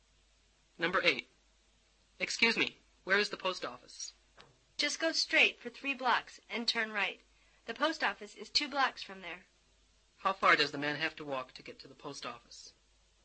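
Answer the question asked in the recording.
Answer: 5 blocks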